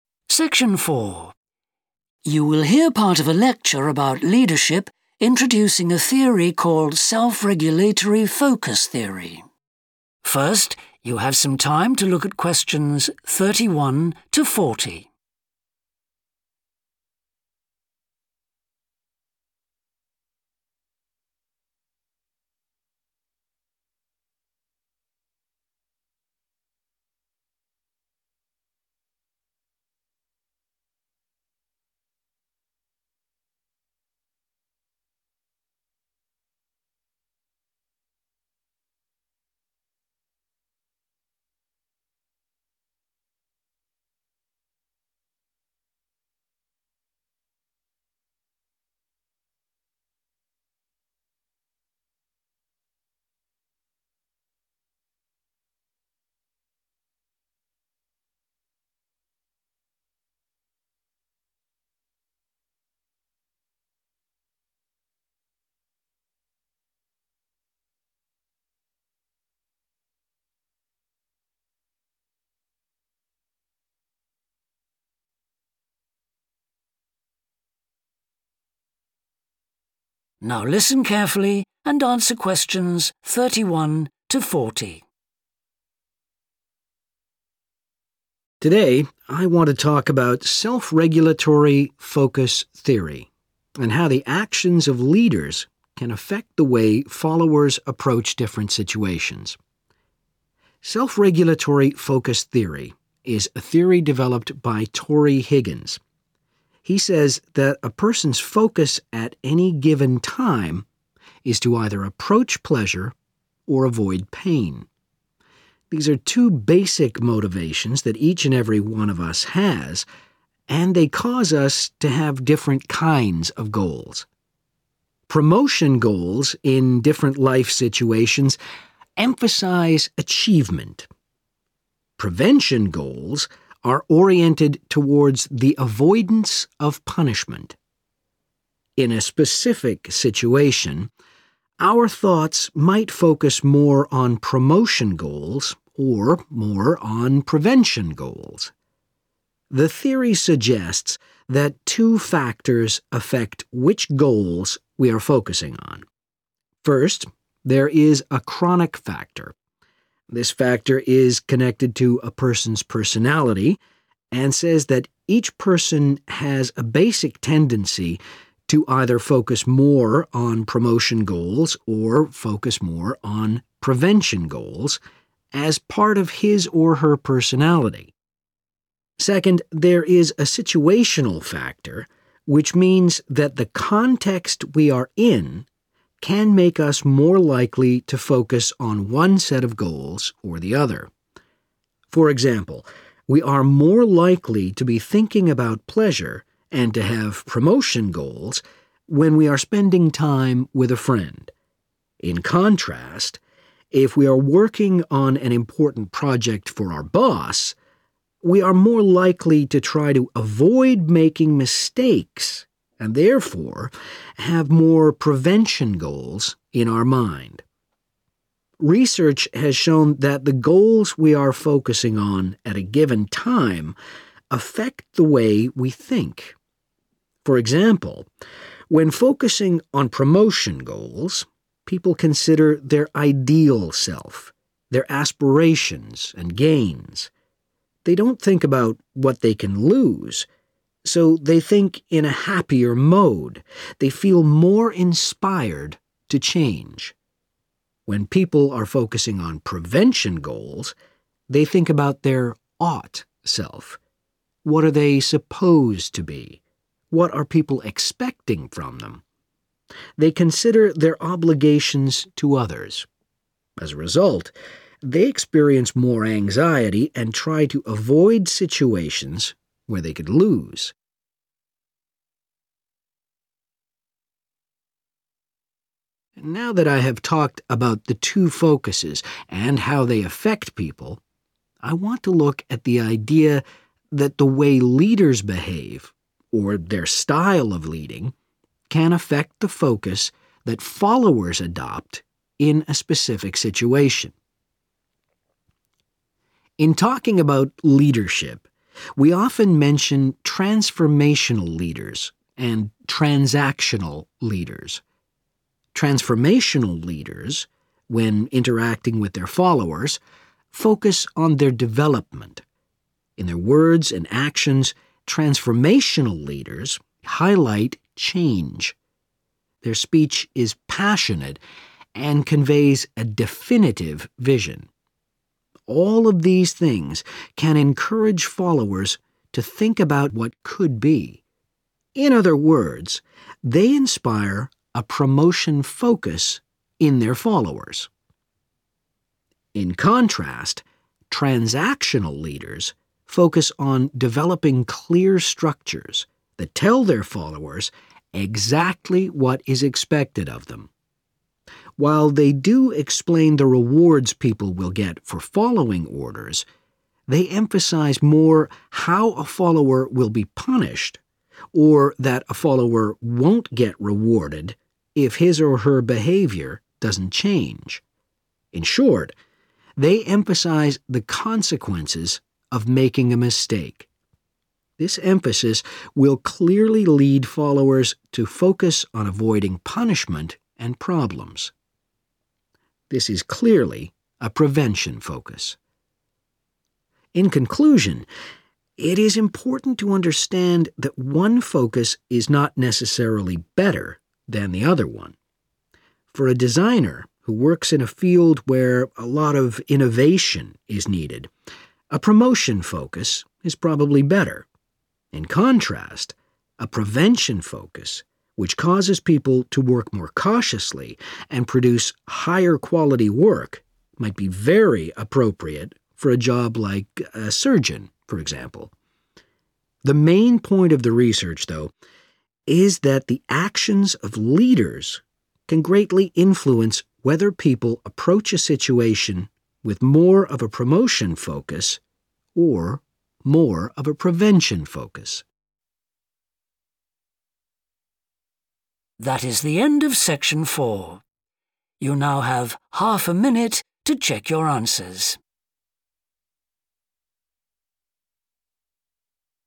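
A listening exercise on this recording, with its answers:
Complete the notes below. Write ONE WORD ONLY.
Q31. Promotion goals focus on (31)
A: achievement

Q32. • comes from one's (32)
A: personality

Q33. The (33) Factor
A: situational

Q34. • we are more likely to focus on promotion goals when with a (34)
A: friend

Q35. Promotion Focus: People think about an ideal version of themselves, their (35) and their gains.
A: aspirations

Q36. Leadership behaviour and (36) affects people's focus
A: style

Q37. • pay special attention to the (37) of their followers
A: development

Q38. • passionately communicate a clear (38)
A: vision

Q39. • create (39) to make expectations clear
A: structures

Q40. Promotion Focus is good for jobs requiring (40)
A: innovation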